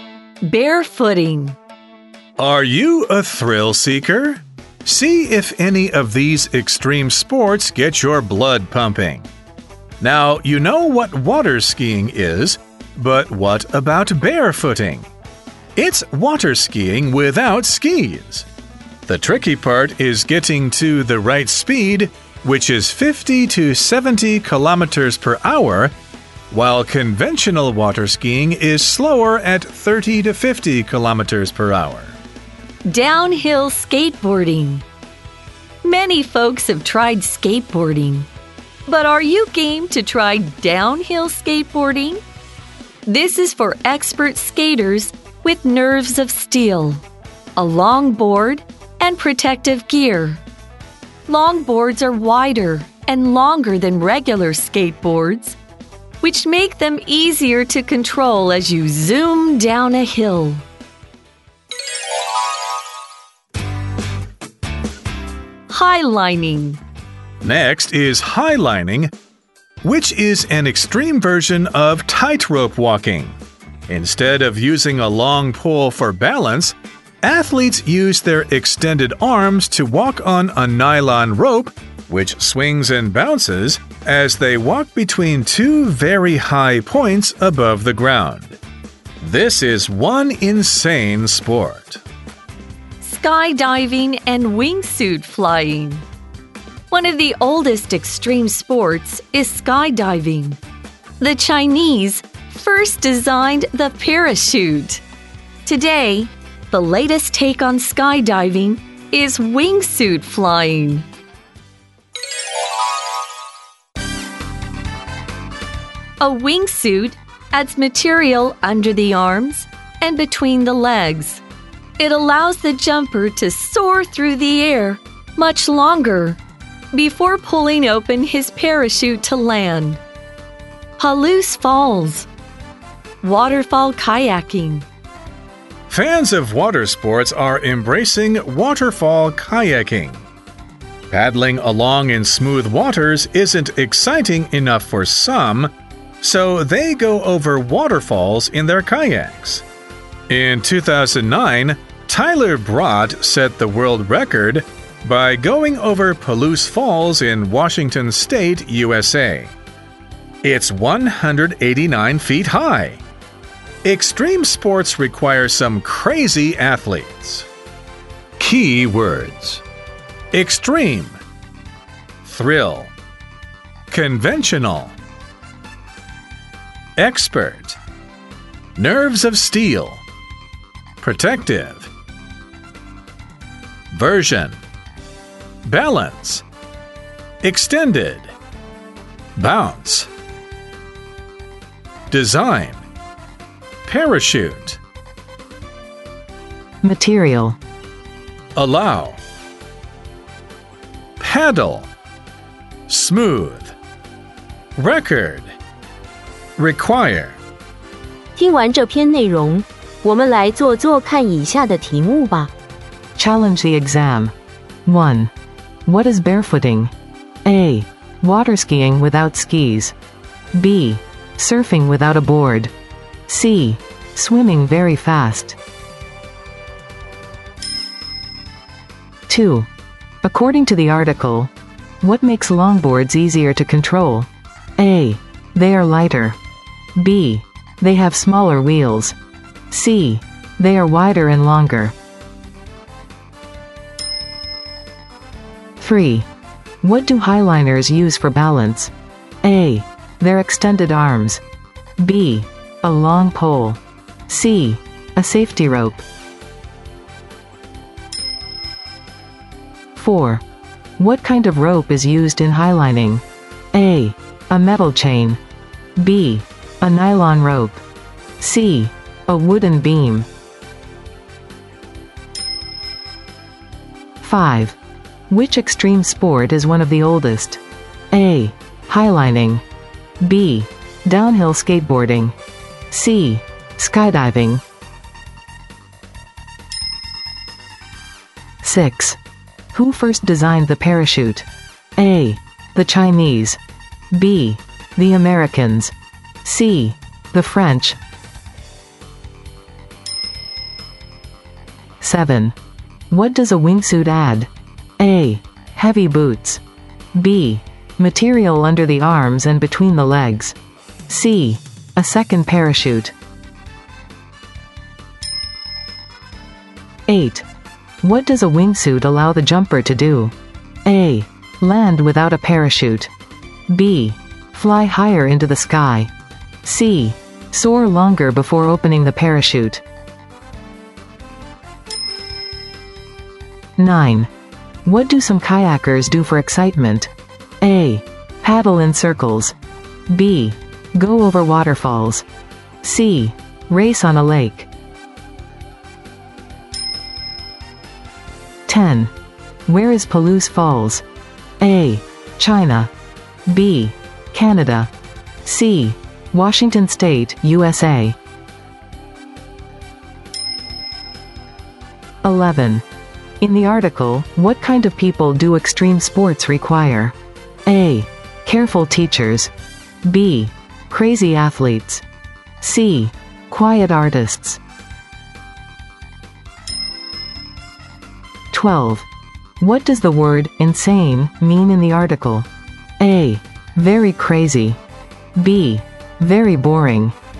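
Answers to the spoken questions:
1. A: Water skiing without skis.
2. C: They are wider and longer.
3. A: Their extended arms.
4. B: A nylon rope.
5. C: Skydiving.
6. A: The Chinese.
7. B: Material under the arms and between the legs.
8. C: Soar longer before opening the parachute.
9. B: Go over waterfalls.
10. C: Washington State, USA.
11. B: Crazy athletes.
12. A: Very crazy.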